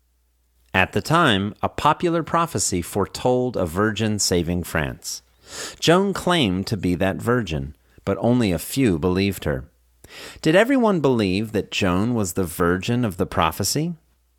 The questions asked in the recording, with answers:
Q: Did everyone believe that Joan was the virgin of the prophecy?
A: No, only a few people believed her.